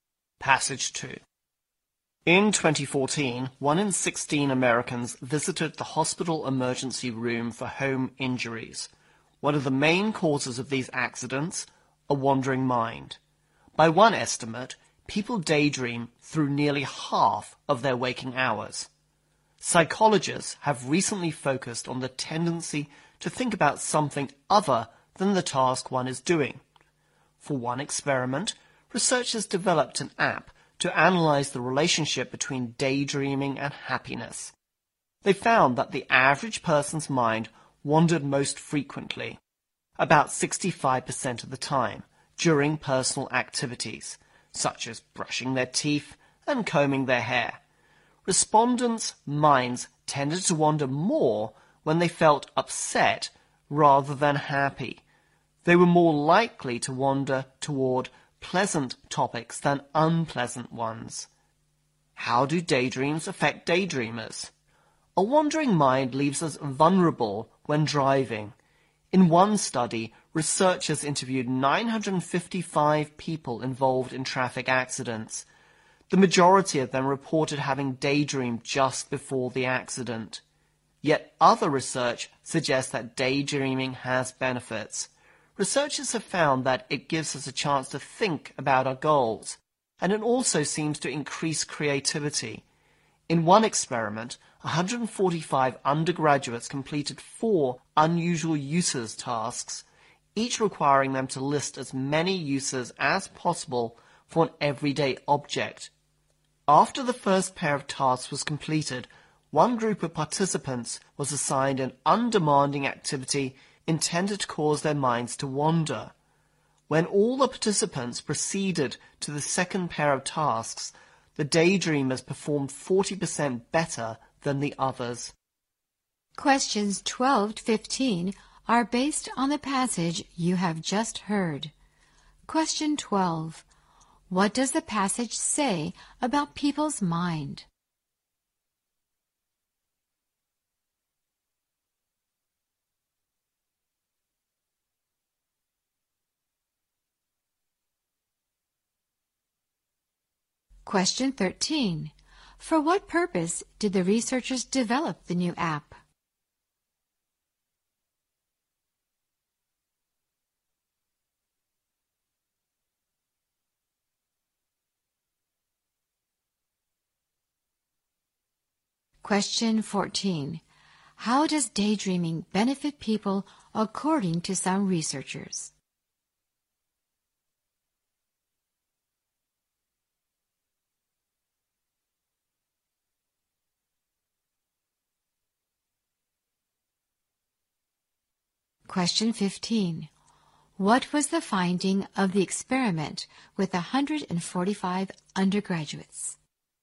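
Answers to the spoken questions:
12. People daydream through nearly half of their waking hours
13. To analyze the relationship between daydreaming and happiness
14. It lets us think about our goals and increases creativity
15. The daydreamers performed 40% better on the second tasks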